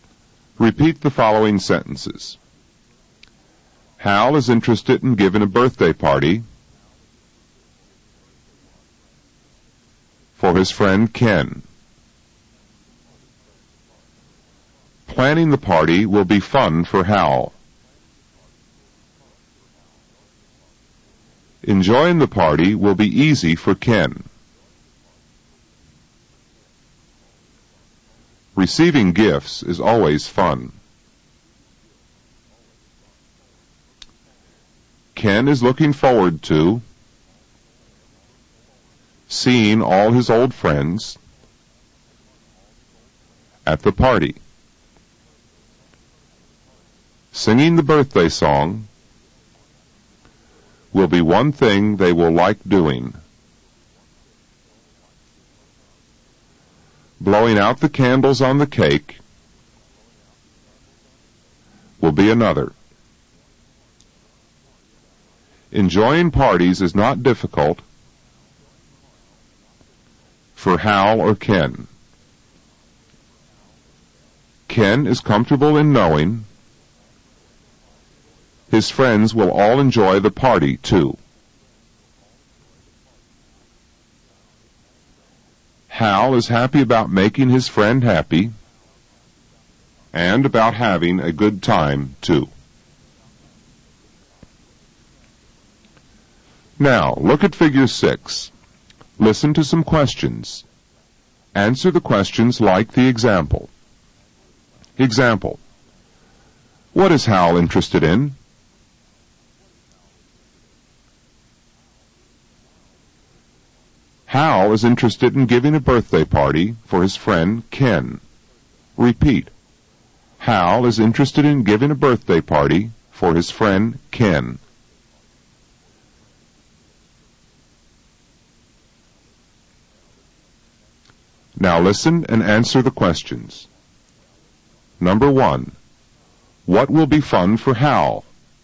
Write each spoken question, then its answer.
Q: What will be fun for Hal?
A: Planning the party will be fun for Hal.